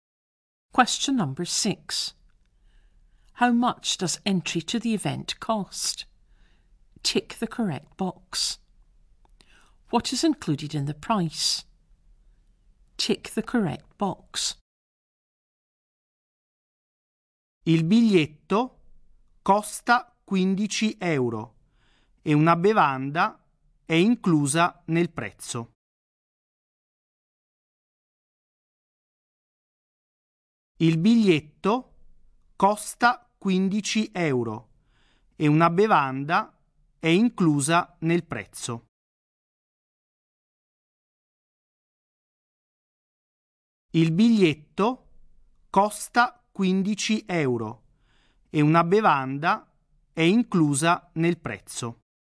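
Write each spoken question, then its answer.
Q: How much does entry to the event cost?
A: 15 euros

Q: What is included in the price?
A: A drink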